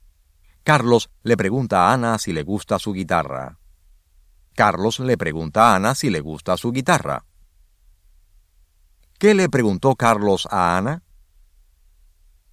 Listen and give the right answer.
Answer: Carlos le preguntó a Ana si le gustaba su guitarra.